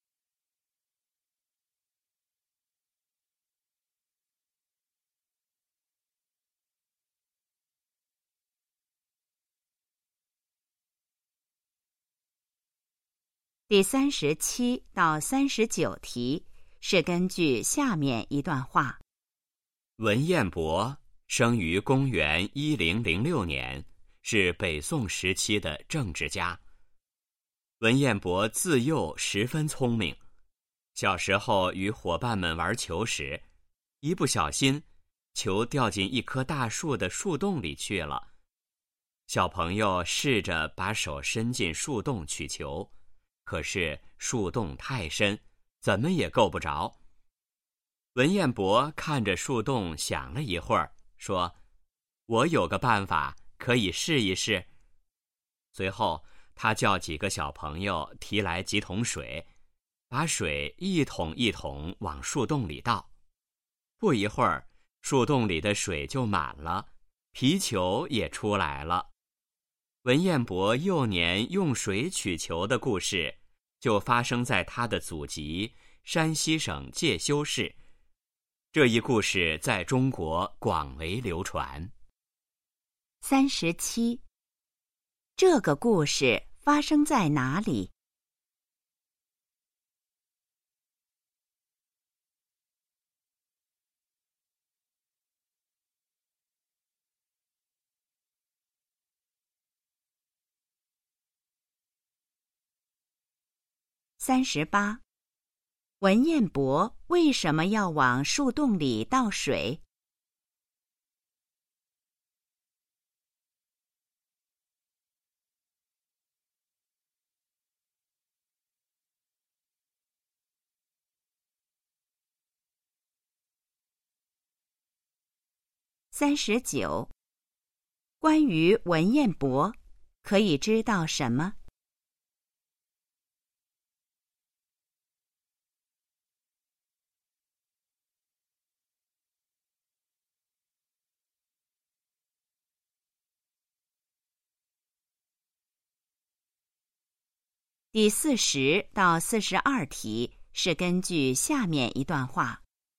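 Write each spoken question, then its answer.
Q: 这个故事发生在哪里?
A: 山西省介休市

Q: 文彦博为什么要往树洞里倒水?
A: 让球浮出来

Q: 关于文彦博,可以知道什么?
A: 他从小很聪明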